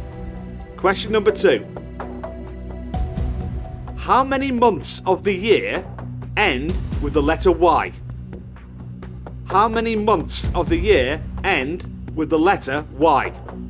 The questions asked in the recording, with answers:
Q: How many months of the year end with the letter Y?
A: There are 4 months that end with the letter Y: January, February, May, and July.